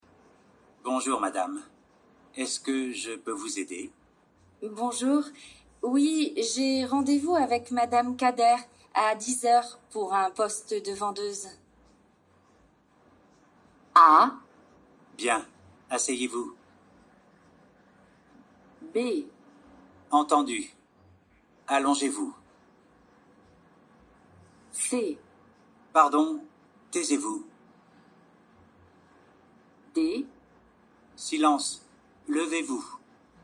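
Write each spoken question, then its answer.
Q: Bonjour, oui, j'ai rendez-vous avec madame Kader à 10h pour un poste de vendeuse.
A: A: Bien, asseyez-vous.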